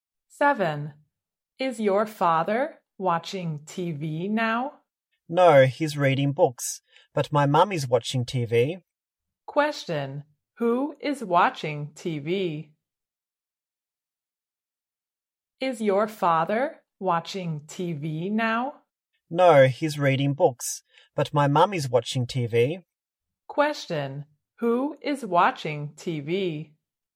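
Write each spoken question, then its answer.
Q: who is watching TV?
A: His mum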